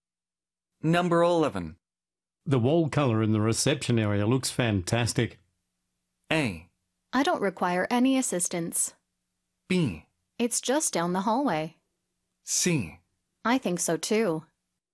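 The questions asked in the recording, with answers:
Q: The wall color in the reception area looks fantastic.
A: C: I think so too.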